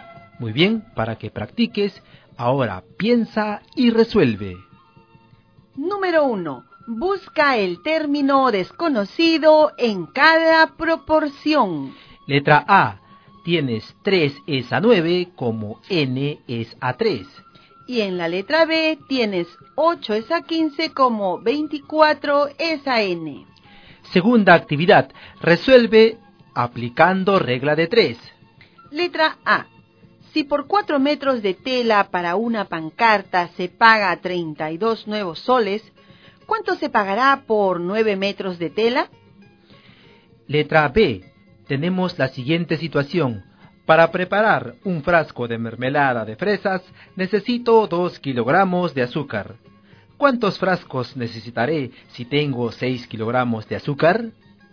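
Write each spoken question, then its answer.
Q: Letra A. Tienes 3 es a 9 como n es a 3.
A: n = 1

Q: Y en la letra B tienes 8 es a 15 como 24 es a n.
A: n = 45

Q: Letra A. Si por 4 metros de tela para una pancarta se paga 32 nuevos soles, ¿cuánto se pagará por 9 metros de tela?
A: 72 nuevos soles

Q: ¿Cuántos frascos necesitaré si tengo 6 kilogramos de azúcar?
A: 3 frascos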